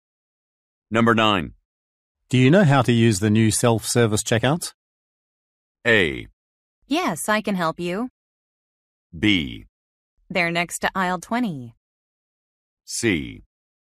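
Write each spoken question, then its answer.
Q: Do you know how to use the new self-service checkouts?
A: A: Yes, I can help you.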